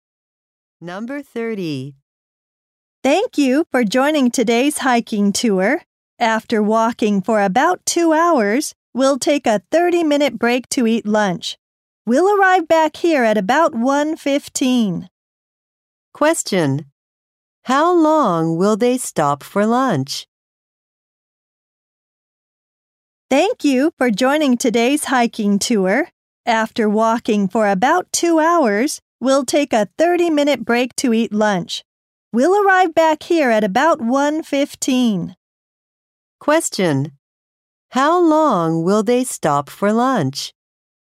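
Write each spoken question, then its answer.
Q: How long will they stop for lunch?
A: 30 minutes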